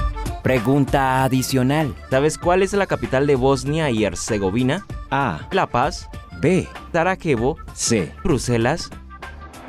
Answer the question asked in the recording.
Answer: Si tu respuesta fue Sarajevo, es correcto.